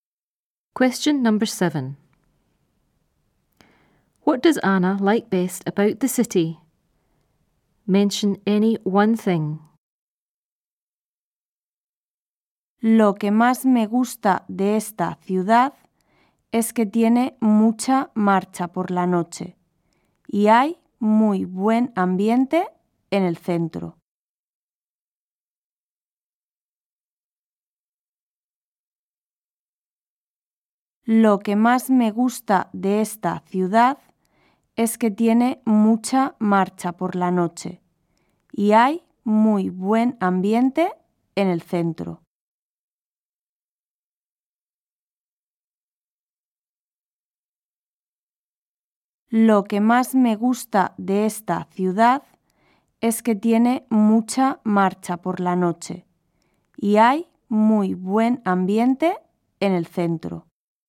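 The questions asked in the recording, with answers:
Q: What does Anna like best about the city?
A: Lively nightlife; good atmosphere in the centre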